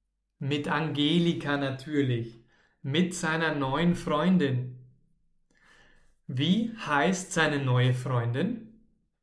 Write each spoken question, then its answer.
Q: Wie heißt seine neue Freundin?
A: Seine neue Freundin heißt Angelika.